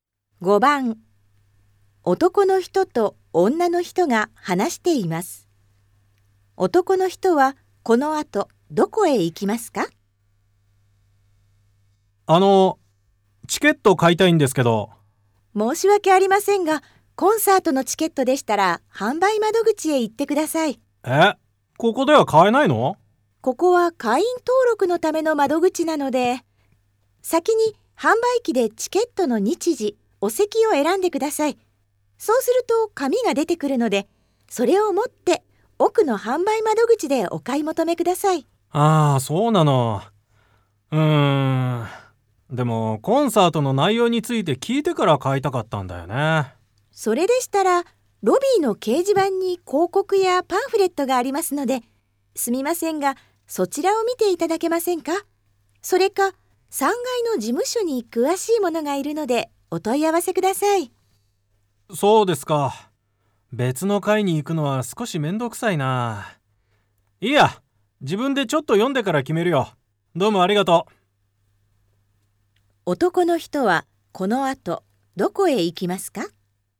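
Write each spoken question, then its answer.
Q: 男の人はこの後どこへ行きますか?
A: ロビーの掲示板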